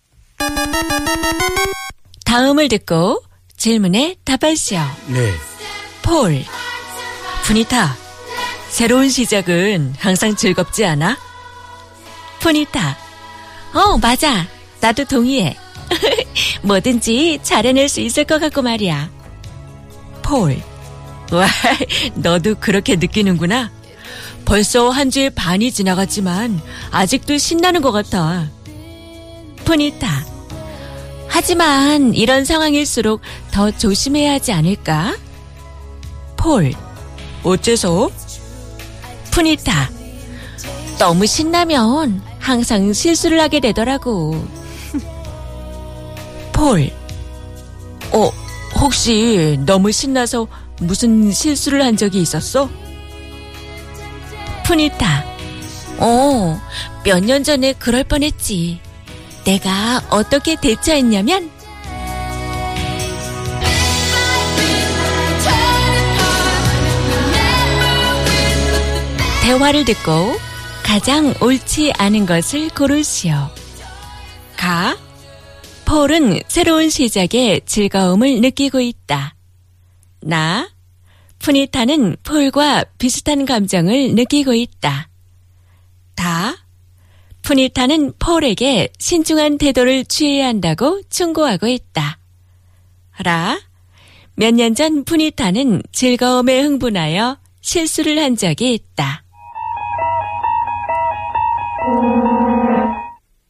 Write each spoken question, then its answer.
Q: 대화를 듣고 가장 옳지 않은 것을 고르시오.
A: It was la.